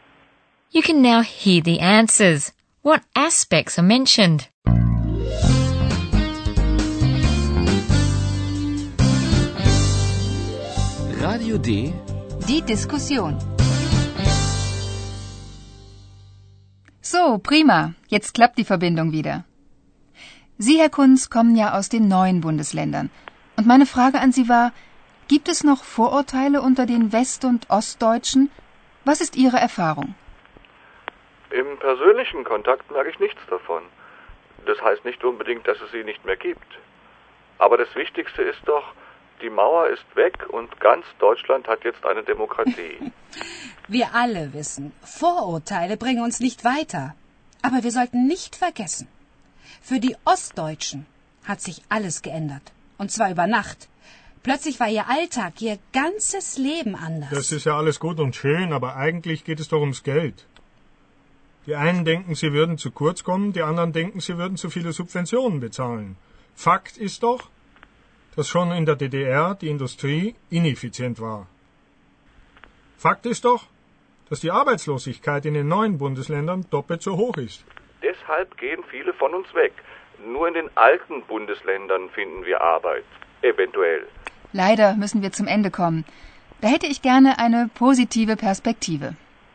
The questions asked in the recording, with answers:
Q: What aspects are mentioned?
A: Herr Kunz says that he doesn't notice any prejudices as far as personal contacts go.